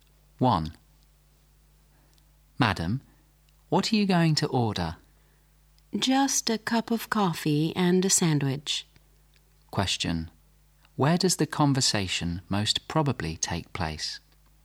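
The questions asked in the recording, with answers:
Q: Where does the conversation most probably take place?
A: In a restaurant or café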